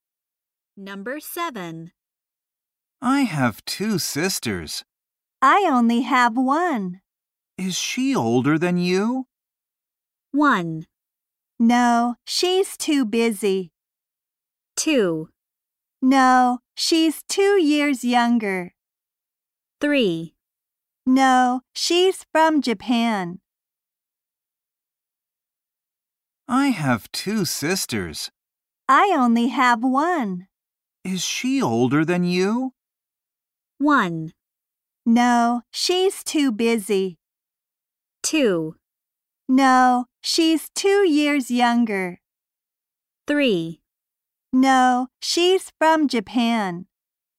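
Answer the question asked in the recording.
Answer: 2: No, she's 2 years younger.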